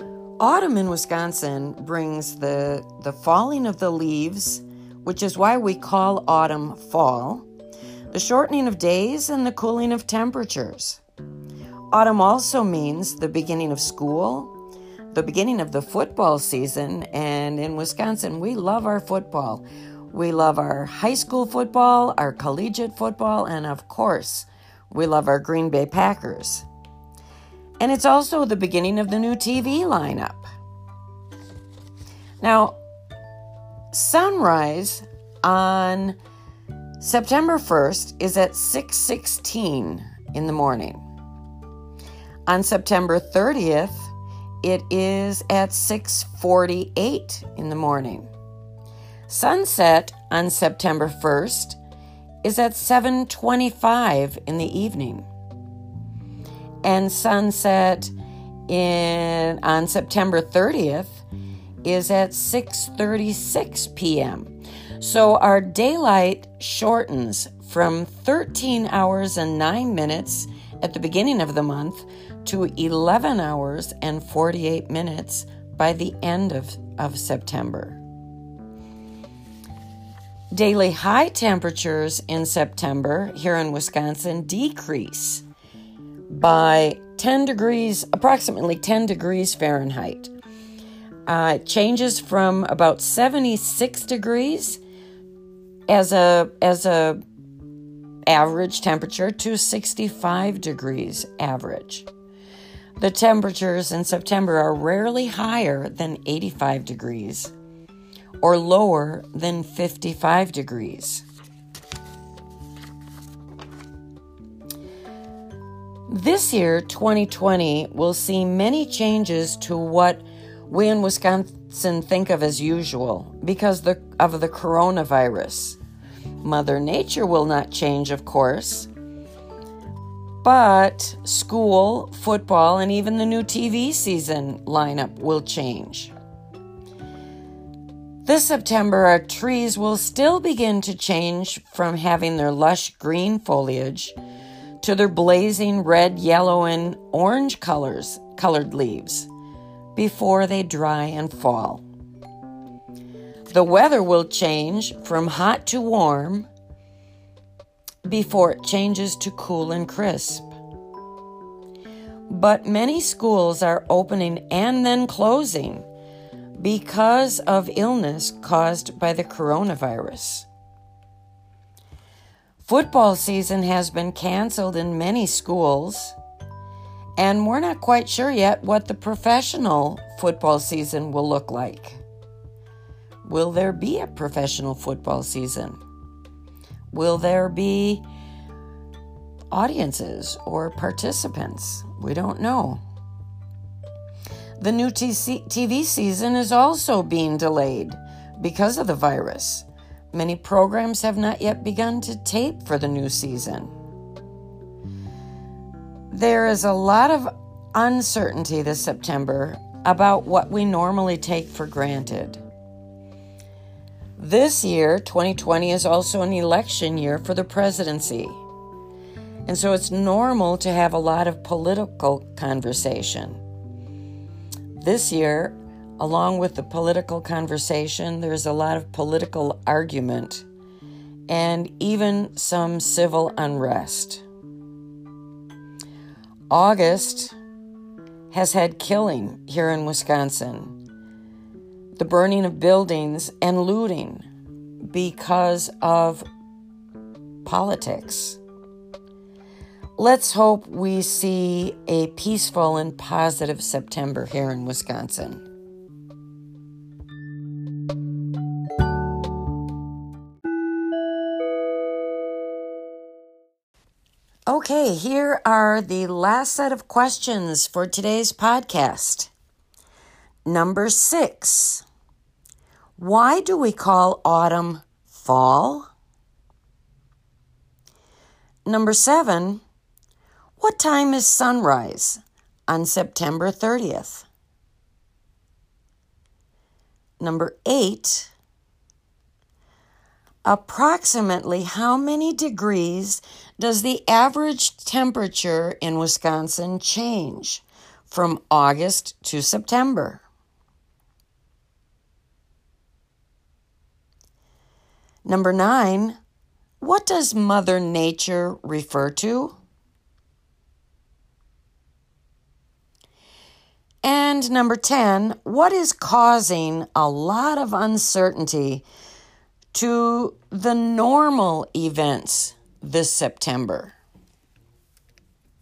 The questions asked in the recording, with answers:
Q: Why do we call autumn fall?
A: Number six, autumn is referred to as fall often because that's when the leaves fall from the trees.

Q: What time is sunrise on September 30th?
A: Number seven, on September 30th, sunrise is at 648.

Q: approximately how many degrees does the average temperature in Wisconsin change from August to September?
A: Number eight, from August to September, the temperature changes, it drops approximately 10 degrees Fahrenheit.

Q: what is causing a lot of uncertainty to the normal events this September?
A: And number 10, what is wreaking havoc and, or creating so much uncertainty in our events is the coronavirus, also known as COVID 19.